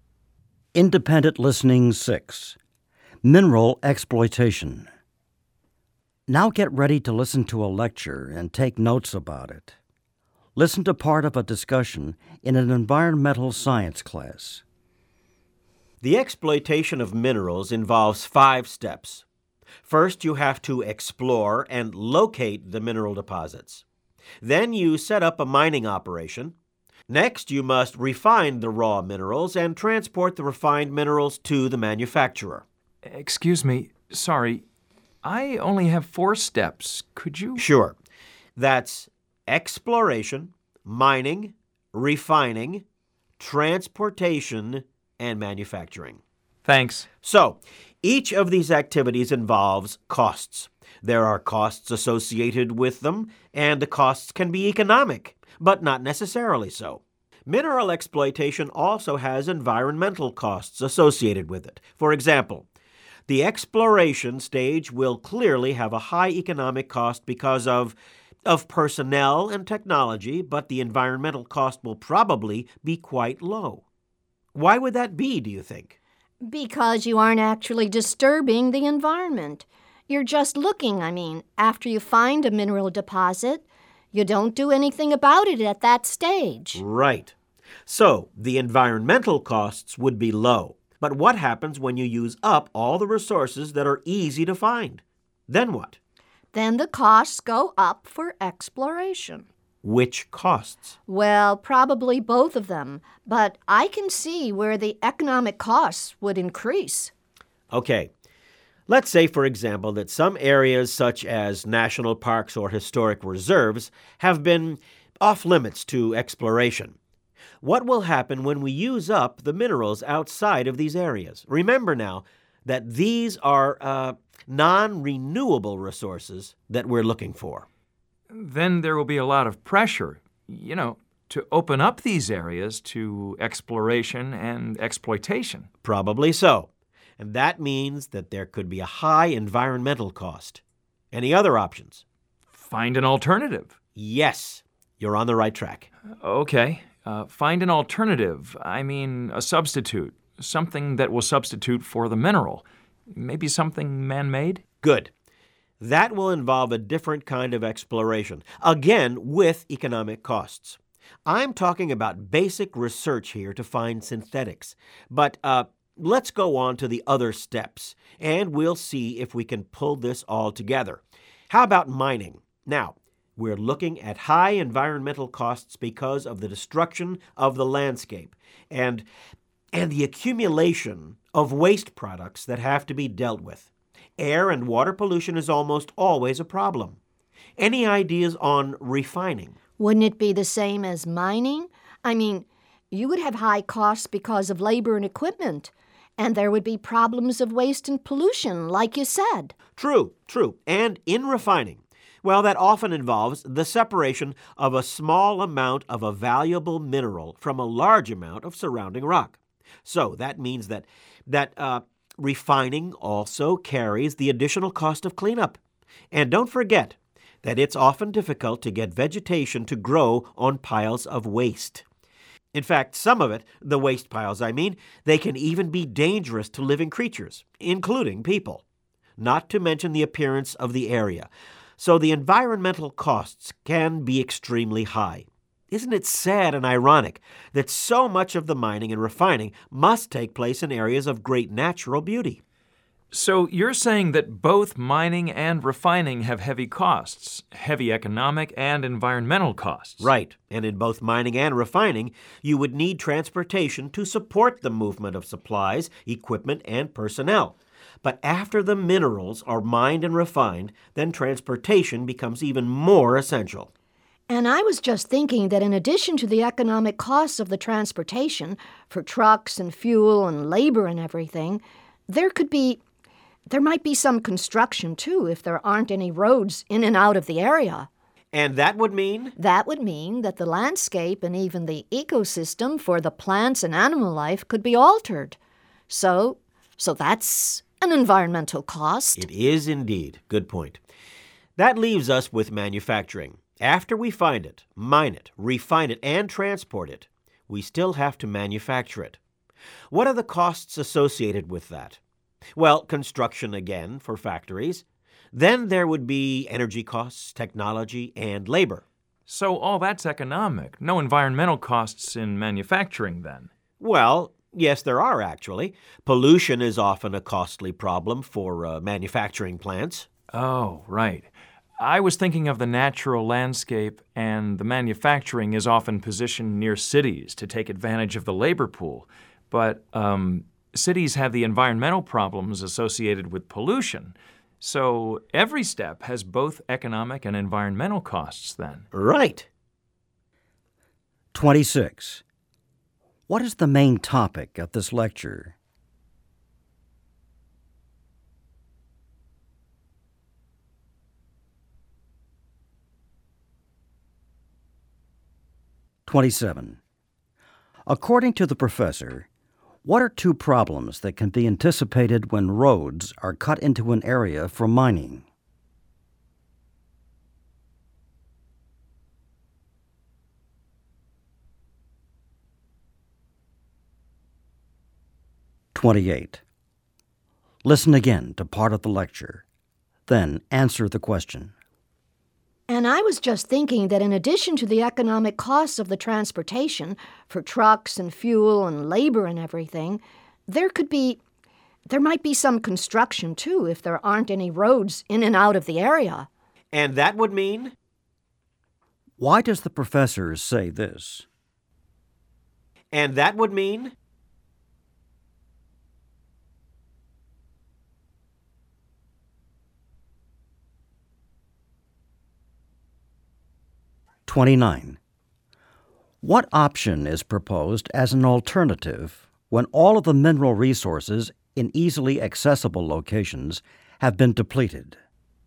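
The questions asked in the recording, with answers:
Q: What is the main topic of this lecture?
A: The economic and environmental costs of the steps in mineral exploitation

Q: What option is proposed as an alternative when all of the mineral resources in easily accessible locations have been depleted?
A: Finding a substitute, such as a man-made synthetic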